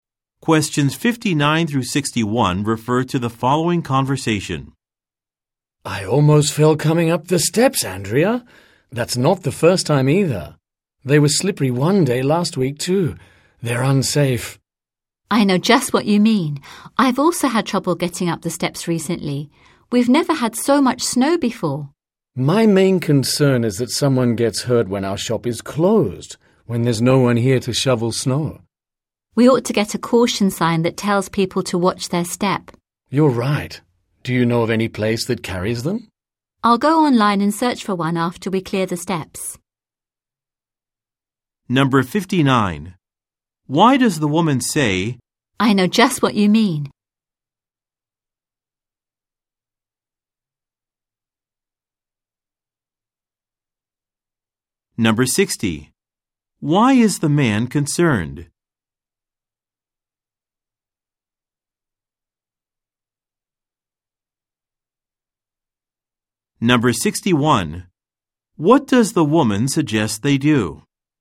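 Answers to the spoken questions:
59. She agrees the steps are unsafe; she has also had trouble on them
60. Someone might get hurt on the snowy steps when the shop is closed
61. Get a caution sign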